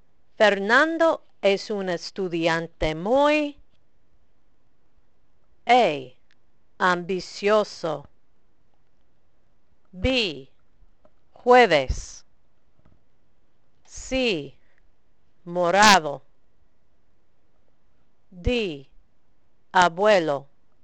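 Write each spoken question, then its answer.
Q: Fernando es un estudiante muy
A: A: ambicioso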